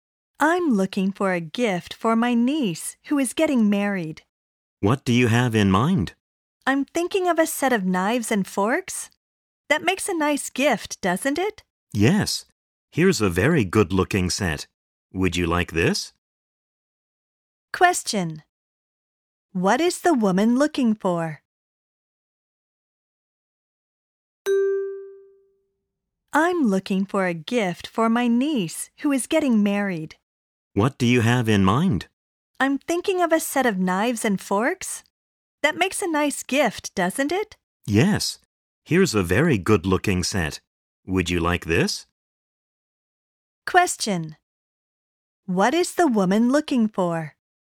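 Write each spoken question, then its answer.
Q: What is the woman looking for?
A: A wedding gift for her niece (a set of knives and forks)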